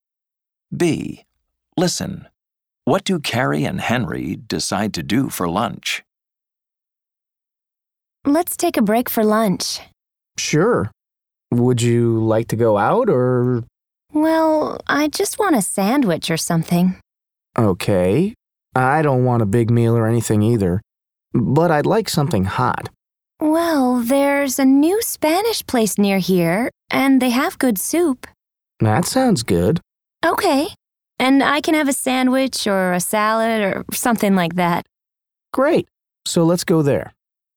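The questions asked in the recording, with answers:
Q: What do Carrie and Henry decide to do for lunch?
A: Go to the new Spanish place nearby for soup and a sandwich or salad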